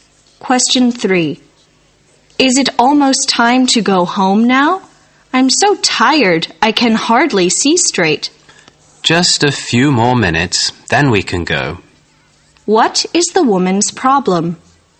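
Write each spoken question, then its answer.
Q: What is the woman's problem?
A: She is very tired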